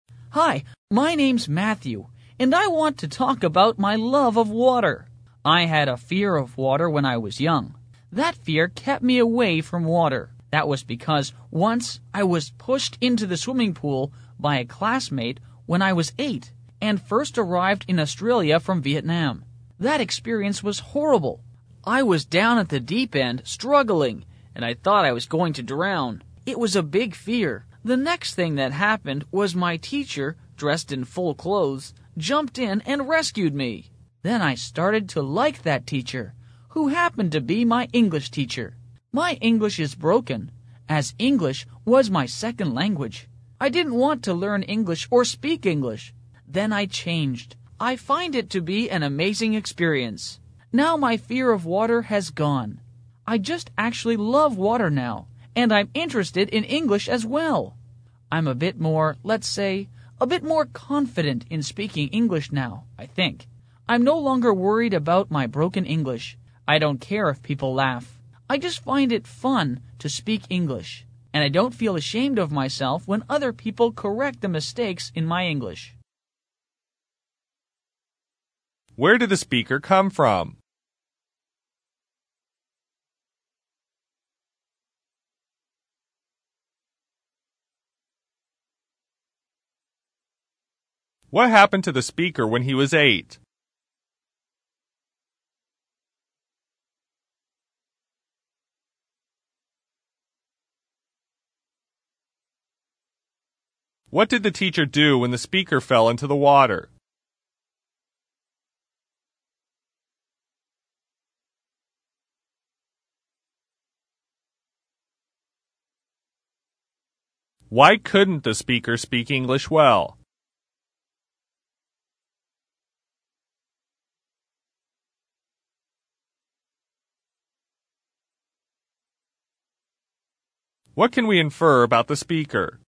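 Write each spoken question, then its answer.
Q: Where did the speaker come from?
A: Vietnam

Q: What happened to the speaker when he was 8?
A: A classmate pushed him into the swimming pool

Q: What did the teacher do when the speaker fell into the water?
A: Jumped in fully clothed and rescued him

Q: Why couldn't the speaker speak English well?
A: English was his second language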